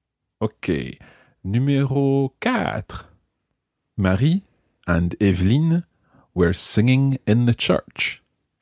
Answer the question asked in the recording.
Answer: Marie et Evelyne chantaient à l'église.